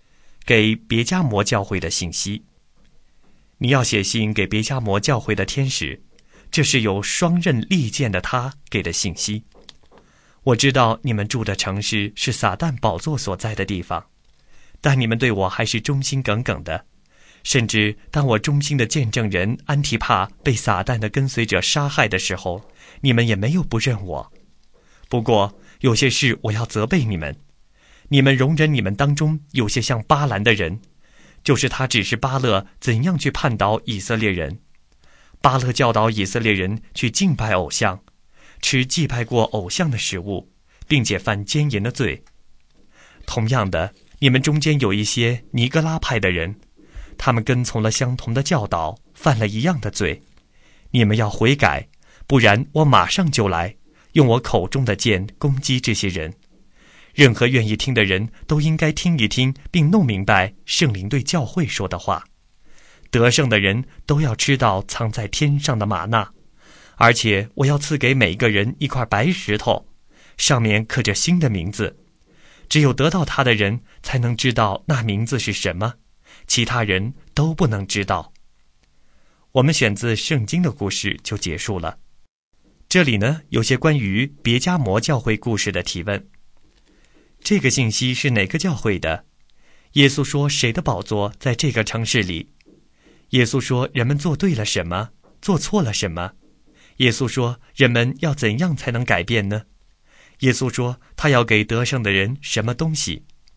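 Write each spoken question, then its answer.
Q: 这个信息是哪个教会的?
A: 别加摩教会

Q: 耶稣说谁的宝座在这个城市里?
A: 撒旦

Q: 耶稣说人们做对了什么,做错了什么?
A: 对:对他忠心,没有不认他;错:容忍像巴兰的人和尼格拉派的人,拜偶像、吃祭偶像之物、犯奸淫

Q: 耶稣说人们要怎样才能改变呢?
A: 要悔改

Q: 耶稣说他要给得胜的人什么东西?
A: 藏在天上的玛纳和一块刻着新名字的白石头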